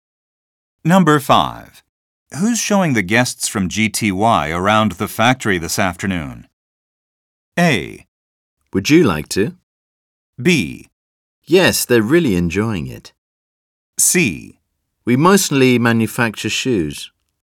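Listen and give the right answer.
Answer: A: Would you like to?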